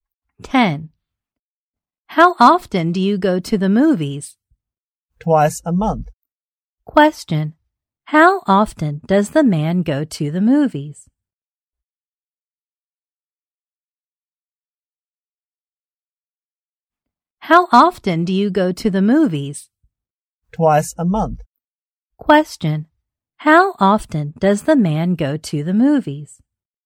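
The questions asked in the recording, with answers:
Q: How often does the man go to the movies?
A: Twice a month.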